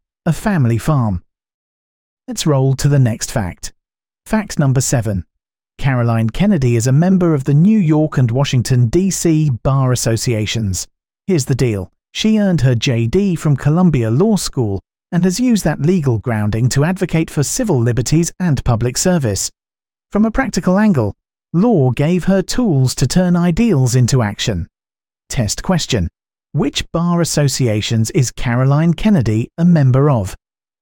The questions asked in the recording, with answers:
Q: Which bar associations is Caroline Kennedy a member of?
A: Correct answer. New York and Washington, D.C.